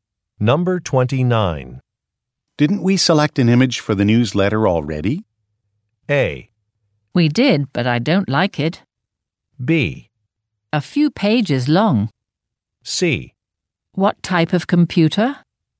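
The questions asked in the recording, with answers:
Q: Didn't we select an image for the newsletter already?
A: A: We did, but I don't like it.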